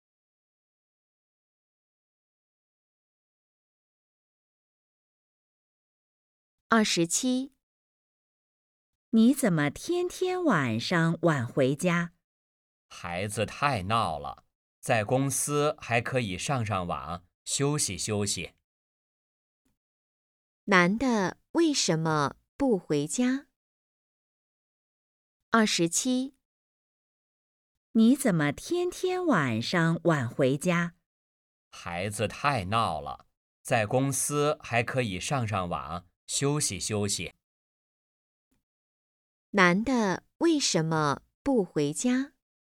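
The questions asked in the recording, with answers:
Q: 男的为什么不回家?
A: 孩子太闹了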